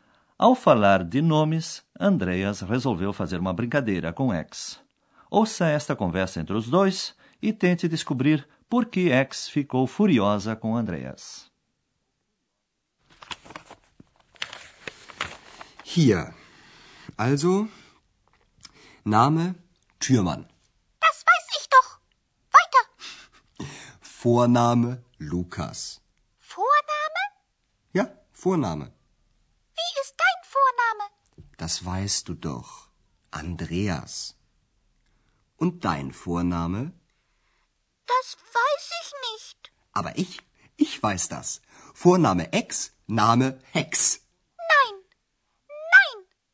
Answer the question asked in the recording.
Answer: Ex não gostou nem um pouco do sobrenome que Andreas inventou para ela.